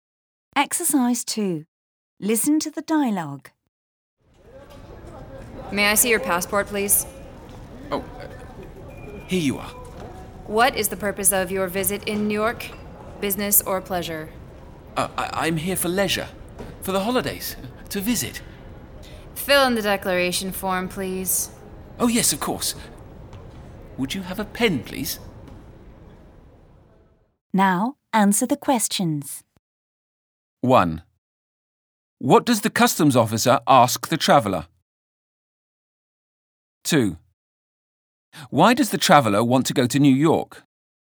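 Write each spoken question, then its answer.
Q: What does the customs officer ask the traveller?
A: To see their passport (and the purpose of the visit)

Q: Why does the traveller want to go to New York?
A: For leisure, for the holidays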